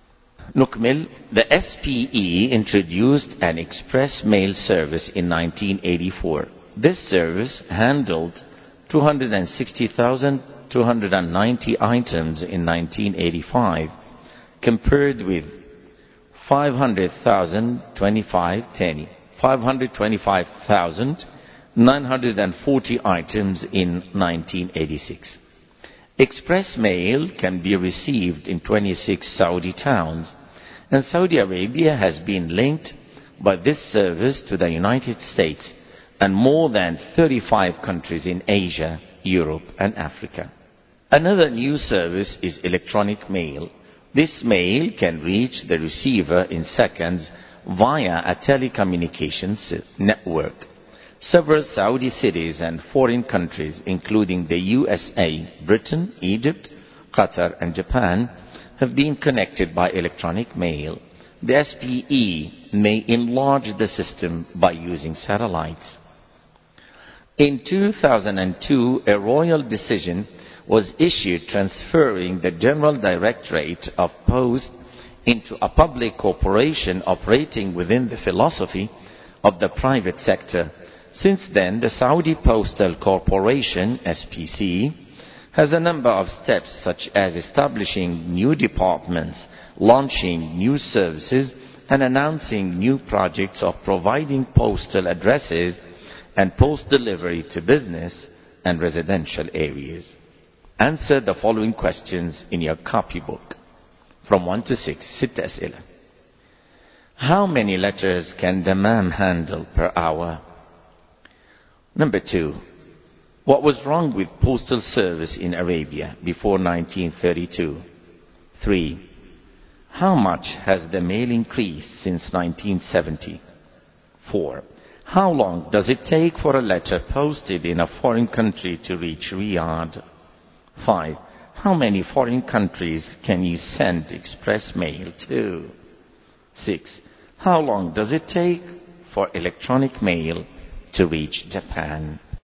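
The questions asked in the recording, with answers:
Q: How many foreign countries can you send express mail to?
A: More than 35 countries (plus the United States)

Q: How long does it take for electronic mail to reach Japan?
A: Seconds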